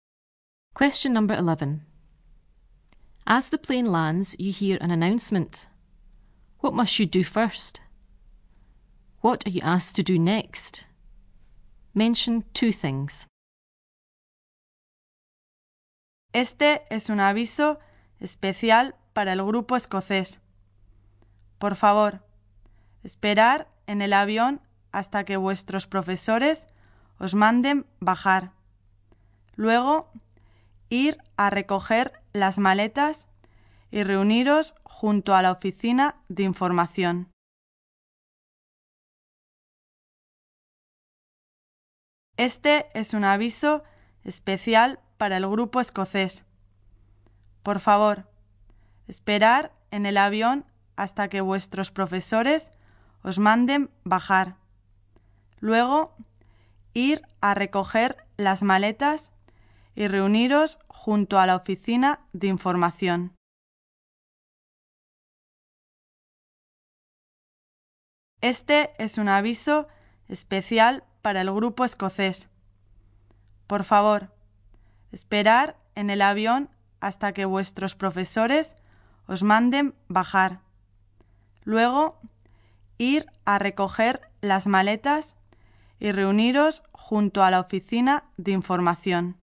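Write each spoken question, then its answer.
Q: What must you do first?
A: Wait on the plane until your teachers tell you to get off

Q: What are you asked to do next?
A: Collect your suitcases and meet beside the information office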